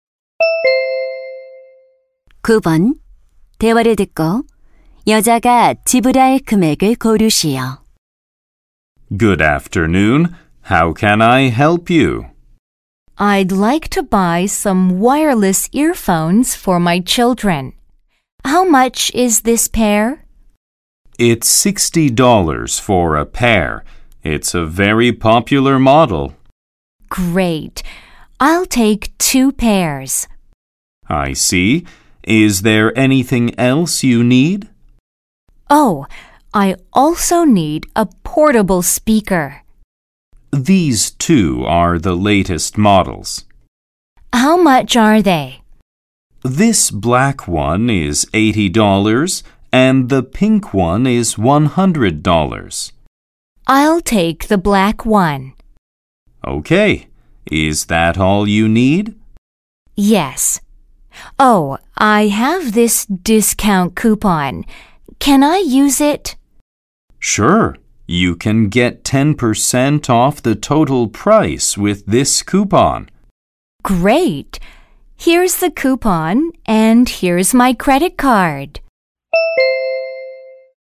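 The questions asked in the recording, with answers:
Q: 대화를 듣고 여자가 지불할 금액을 고르시오.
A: $180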